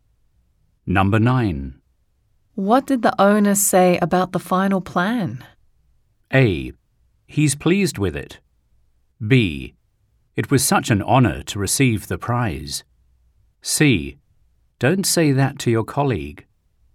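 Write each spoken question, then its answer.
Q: What did the owner say about the final plan?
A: A: He's pleased with it.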